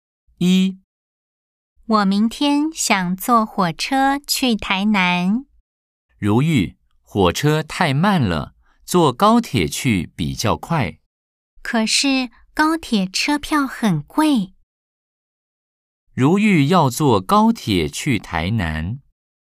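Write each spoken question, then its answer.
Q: 如玉要坐高铁去台南。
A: X (错)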